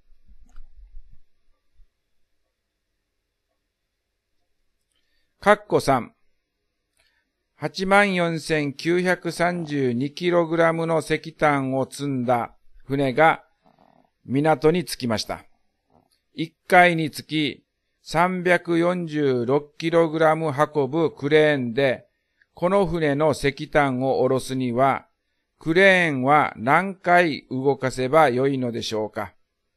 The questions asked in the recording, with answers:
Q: 346kg 運ぶクレーンで、この船の石炭を下ろすには、クレーンは何回動かせばよいのでしょうか。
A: だから答えは246回になります。